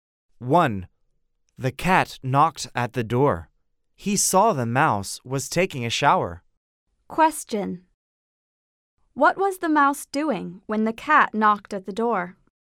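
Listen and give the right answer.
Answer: He was taking a shower.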